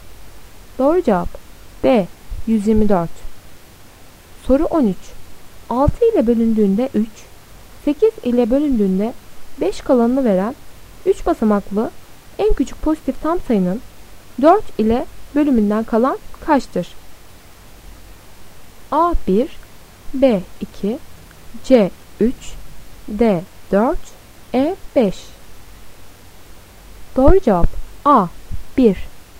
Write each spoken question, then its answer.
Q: 6 ile bölündüğünde 3, 8 ile bölündüğünde 5 kalanını veren 3 basamaklı en küçük pozitif tam sayının 4 ile bölümünden kalan kaçtır?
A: Doğru cevap A 1.